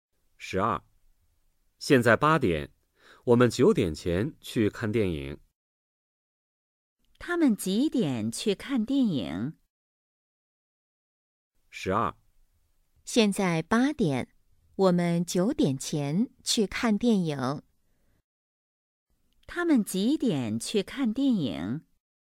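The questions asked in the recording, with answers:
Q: 他们几点去看电影?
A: 九点前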